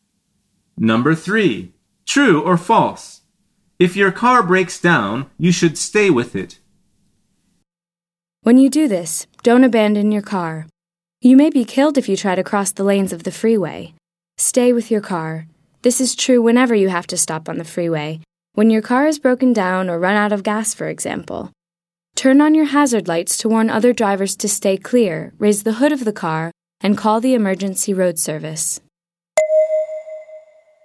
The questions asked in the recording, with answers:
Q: True or false? If your car breaks down, you should stay with it.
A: The answer is true.